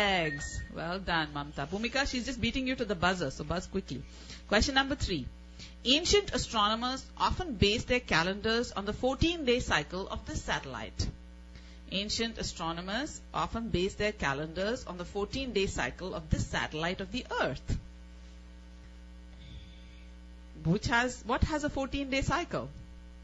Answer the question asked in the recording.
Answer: Moon. They based it on the 14-day cycle of the moon.